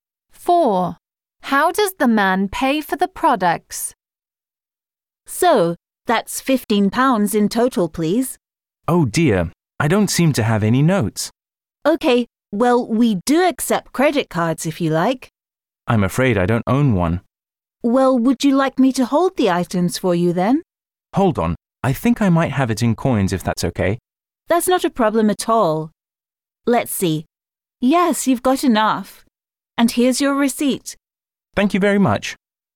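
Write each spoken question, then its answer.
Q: How does the man pay for the products?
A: In coins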